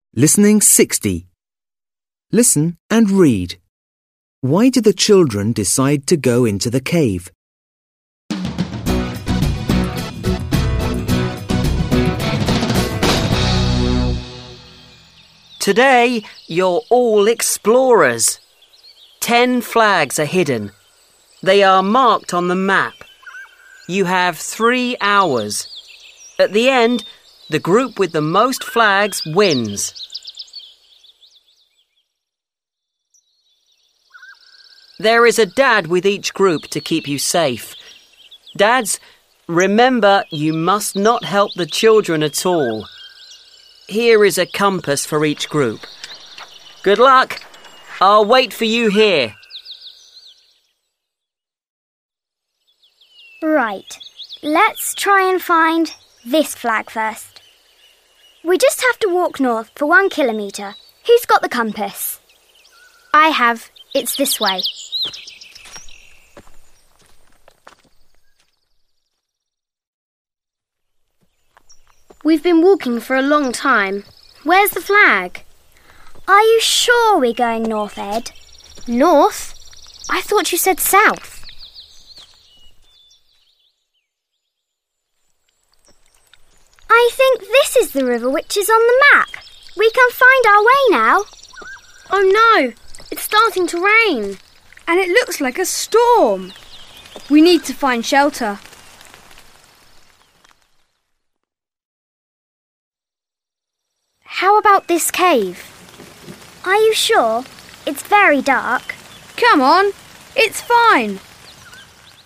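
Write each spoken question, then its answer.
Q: Why do the children decide to go into the cave?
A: To find shelter because it starts to rain and a storm is coming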